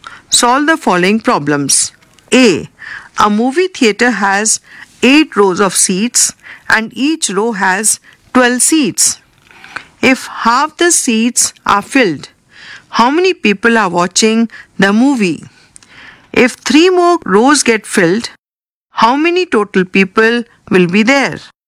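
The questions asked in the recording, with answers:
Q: If half the seats are filled, how many people are watching the movie?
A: 48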